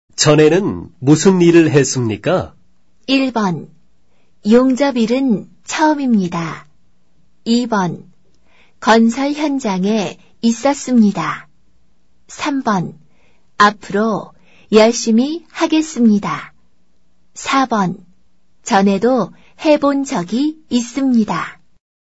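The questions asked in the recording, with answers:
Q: 전에는 무슨 일을 했습니까?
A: 2: 건설 현장에 있었습니다.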